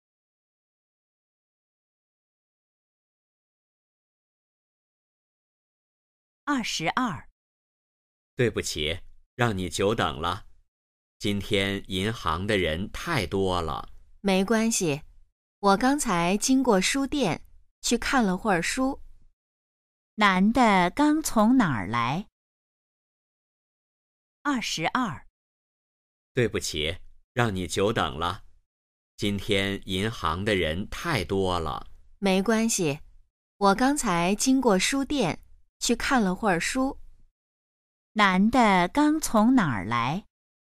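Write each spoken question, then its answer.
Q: 男的刚从哪儿来?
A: 书店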